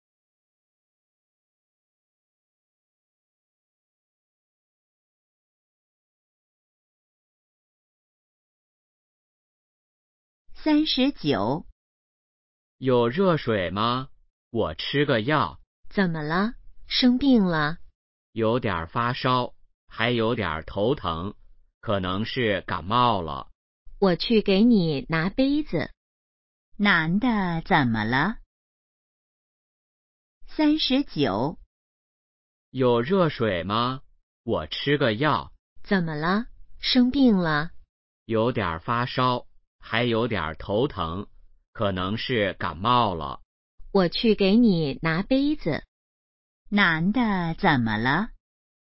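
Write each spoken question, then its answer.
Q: 男的怎么了?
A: 可能感冒了(发烧、头疼)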